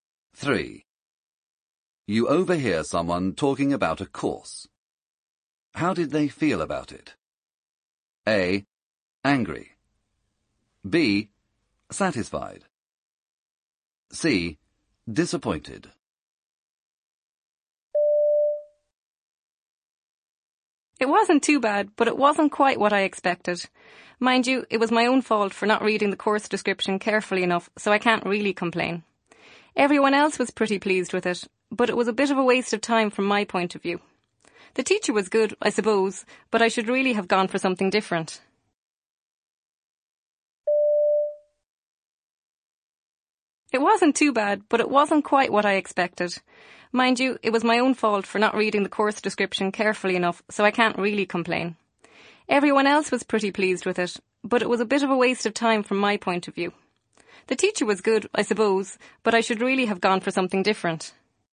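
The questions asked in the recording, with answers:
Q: How did they feel about it?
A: C: Disappointed.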